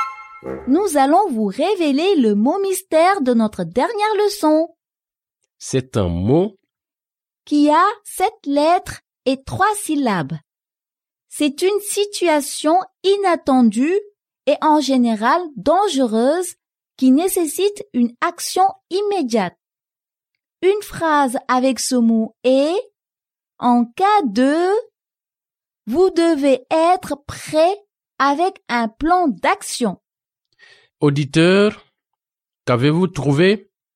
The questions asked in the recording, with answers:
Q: Auditeur, qu'avez-vous trouvé?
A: Le mot mystère d'aujourd'hui est « Urgence ».